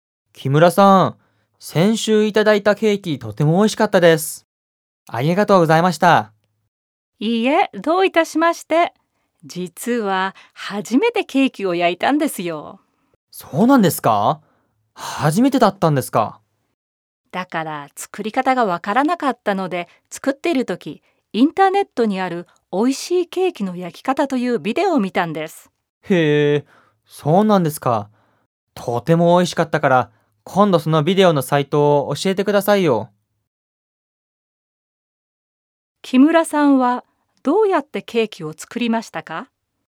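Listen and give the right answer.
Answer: インターネットのビデオを見ながら作った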